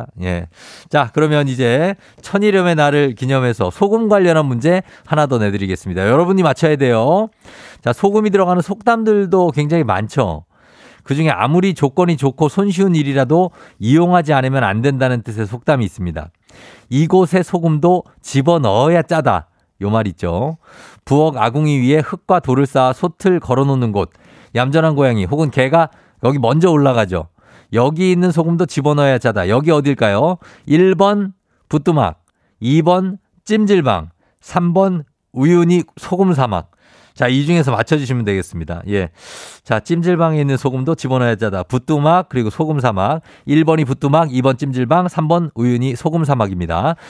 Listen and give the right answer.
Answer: 붓뚜막이죠, 붓두막